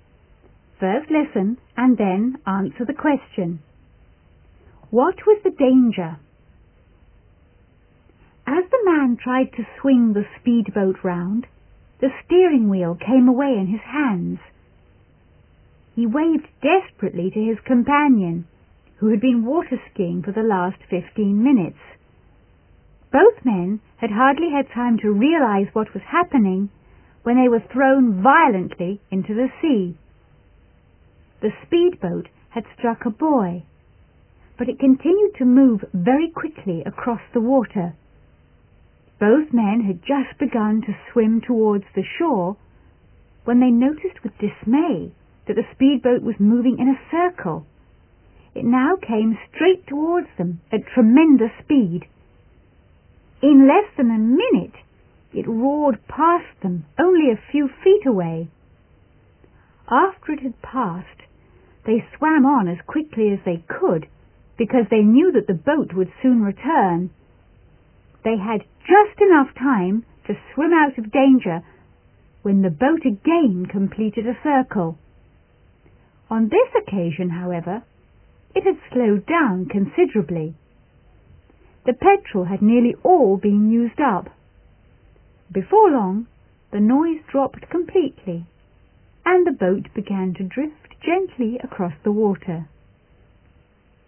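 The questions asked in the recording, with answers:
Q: What was the danger?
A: The out-of-control speedboat kept circling and nearly hit the two men in the water.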